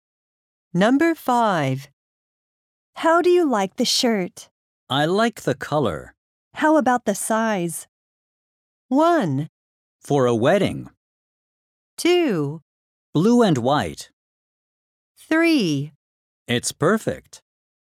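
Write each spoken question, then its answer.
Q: How about the size?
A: 3: It's perfect.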